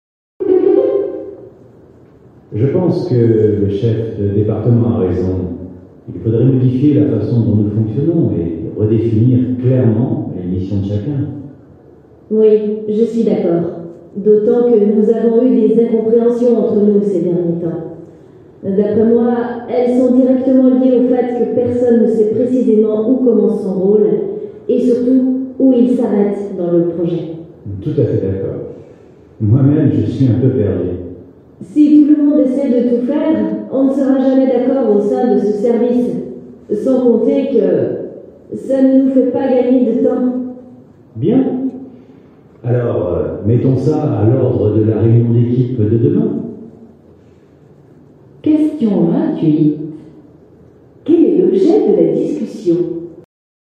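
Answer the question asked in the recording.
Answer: Redéfinir clairement le rôle et les missions de chacun dans le service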